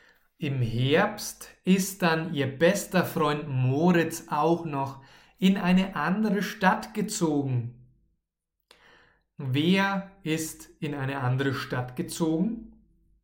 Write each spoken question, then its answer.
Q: Wer ist in eine andere Stadt gezogen?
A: Moritz. Moritz ist in eine andere Stadt gezogen.